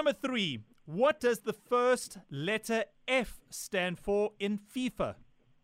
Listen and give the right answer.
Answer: Federation.